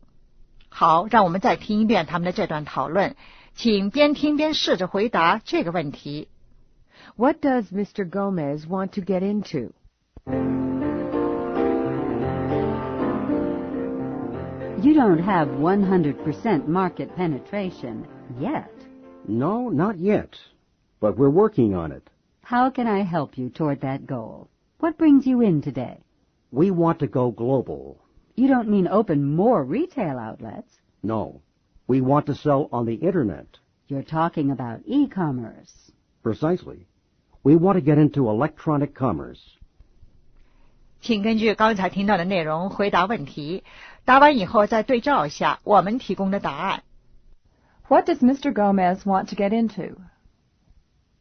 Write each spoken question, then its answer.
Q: What does Mr. Gomez want to get into?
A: E-commerce.